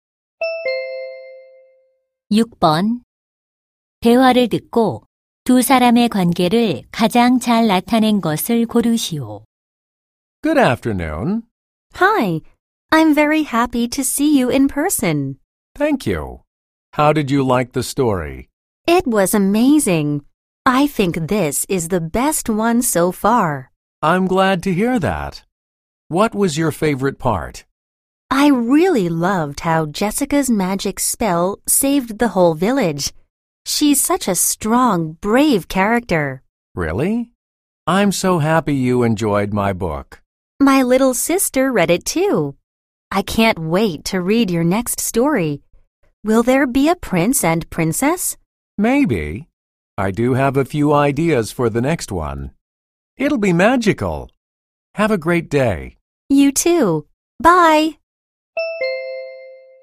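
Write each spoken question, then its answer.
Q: 대화를 듣고 두 사람의 관계를 가장 잘 나타낸 것을 고르시오.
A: 작가 - 독자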